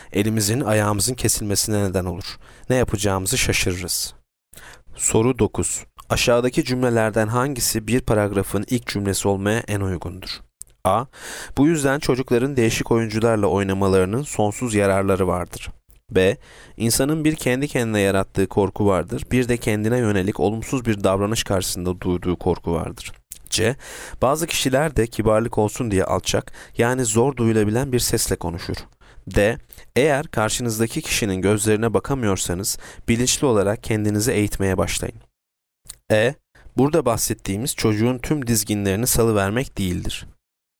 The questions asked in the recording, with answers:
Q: Aşağıdaki cümlelerden hangisi bir paragrafın ilk cümlesi olmaya en uygundur?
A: Yanıt B. İnsanın bir kendi kendine yarattığı korku vardır, bir de kendine yönelik olumsuz bir davranış karşısında duyduğu korku vardır.